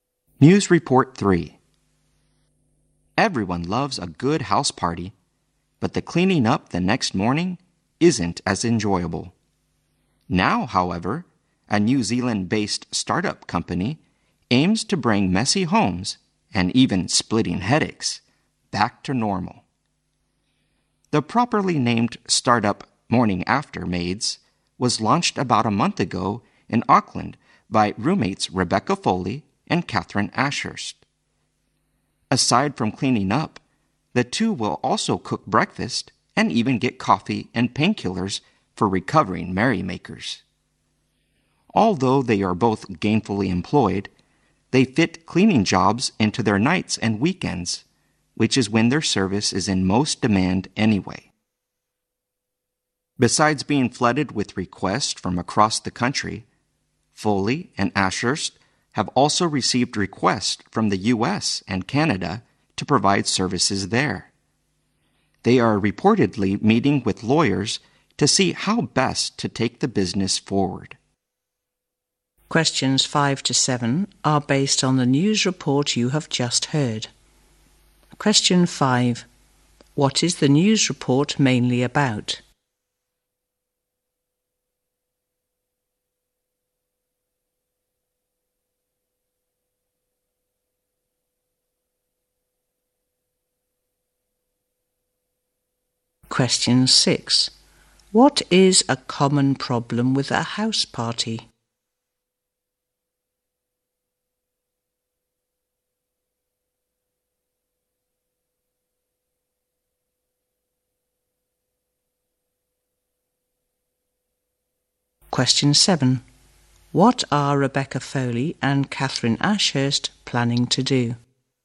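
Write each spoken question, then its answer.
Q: What is the news report mainly about?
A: A startup, Morning After Maids, that cleans up homes after house parties.

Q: What is a common problem with a house party?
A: Cleaning up the next morning.

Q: What are Rebecca Foley and Catherine Ashurst planning to do?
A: Meet with lawyers to see how best to take the business forward.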